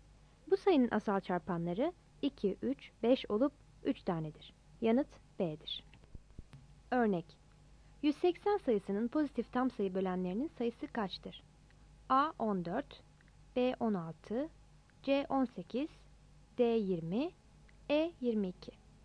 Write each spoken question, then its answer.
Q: Örnek: 180 sayısının pozitif tam sayı bölenlerinin sayısı kaçtır?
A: Yanıt C'dir.